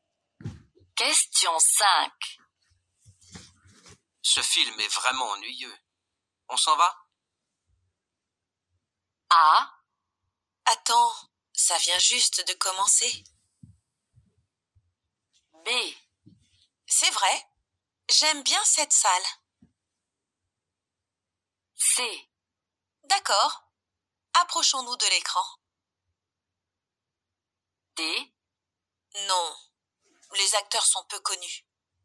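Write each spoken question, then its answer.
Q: Ce film est vraiment ennuyeux. On s'en va?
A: A: Attends, ça vient juste de commencer.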